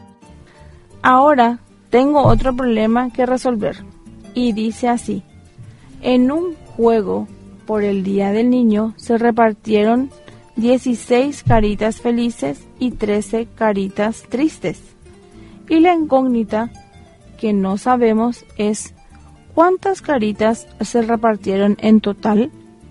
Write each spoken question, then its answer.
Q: ¿cuántas caritas se repartieron en total?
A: Se repartieron en total 29 caritas para hacer el juego.